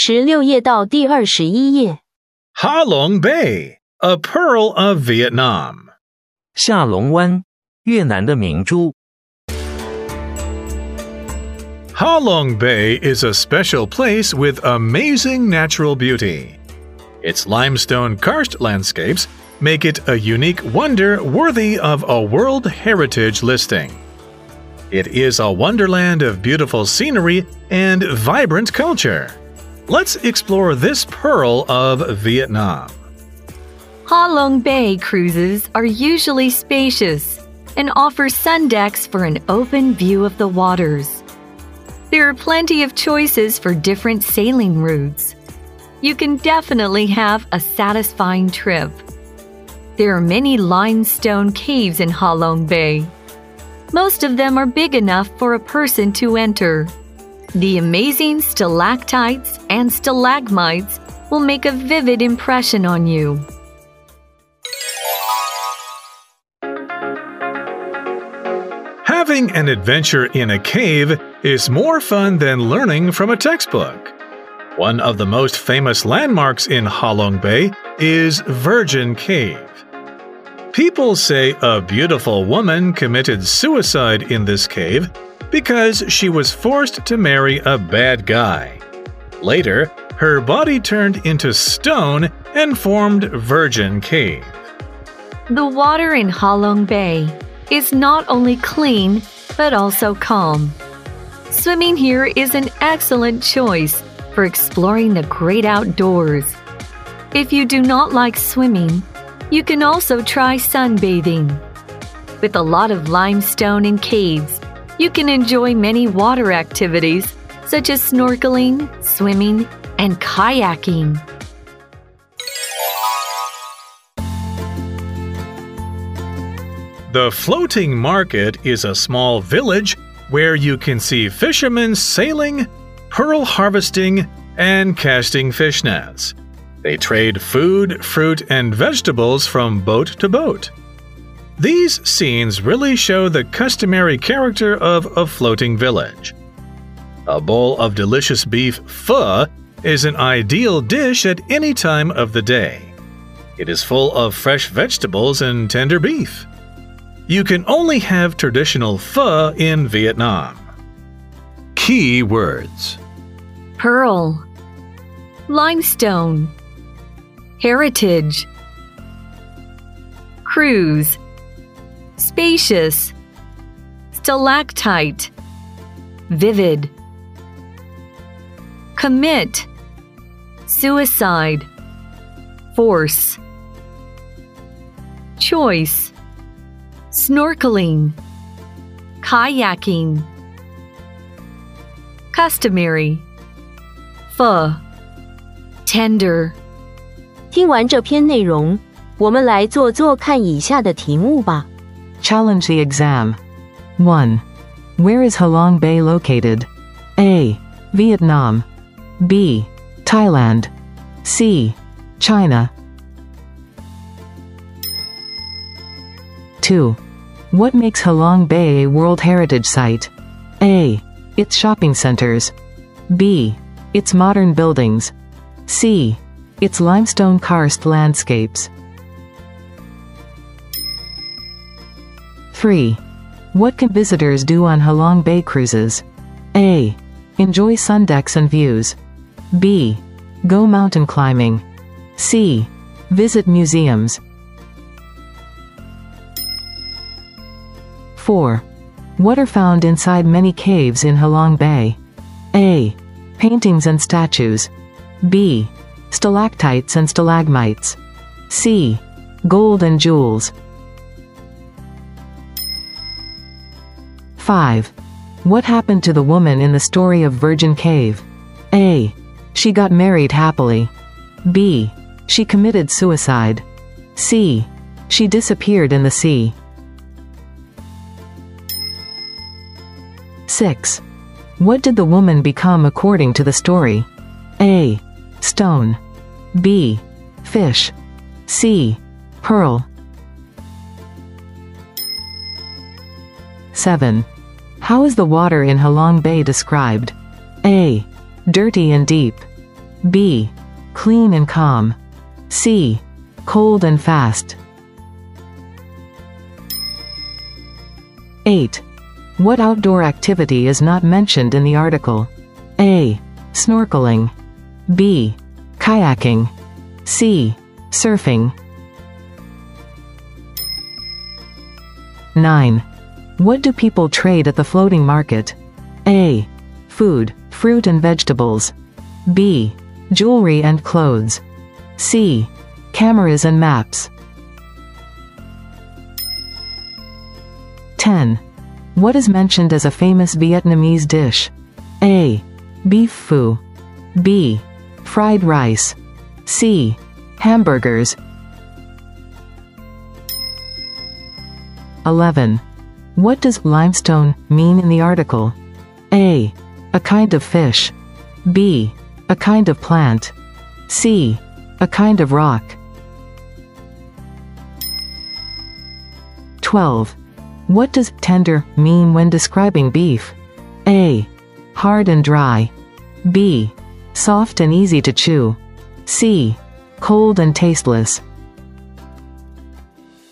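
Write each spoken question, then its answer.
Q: Where is Ha Long Bay located?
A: A: Vietnam

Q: What makes Ha Long Bay a World Heritage Site?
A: C: Its limestone karst landscapes

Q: What can visitors do on Ha Long Bay cruises?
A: A: Enjoy sun decks and views

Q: What are found inside many caves in Ha Long Bay?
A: B: Stalactites and stalagmites

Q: What happened to the woman in the story of Virgin Cave?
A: B: She committed suicide

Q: What did the woman become according to the story?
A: A: Stone

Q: How is the water in Halong Bay described?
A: B: Clean and calm

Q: What outdoor activity is not mentioned in the article?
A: C: Surfing

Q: What do people trade at the floating market?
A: A: Food, fruit and vegetables

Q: What is mentioned as a famous Vietnamese dish?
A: A: Beef phu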